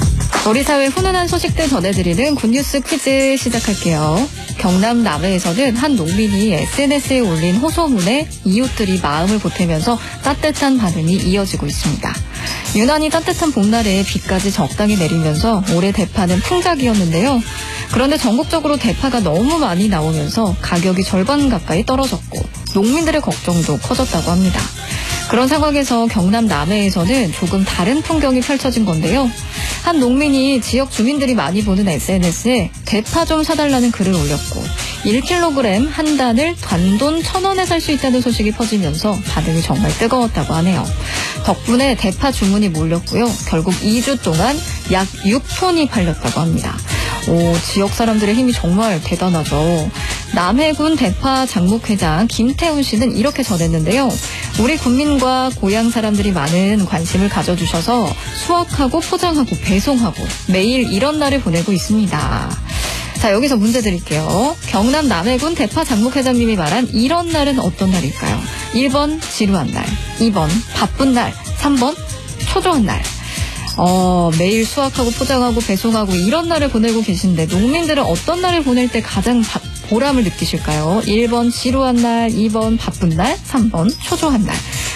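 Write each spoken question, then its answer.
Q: 경남 남해군 대파 장목회장님이 말한 이런 날은 어떤 날일까요?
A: 2: 바쁜 날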